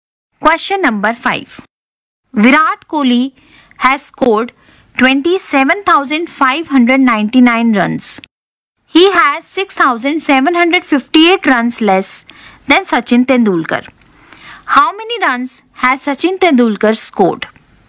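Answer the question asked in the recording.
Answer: 34,357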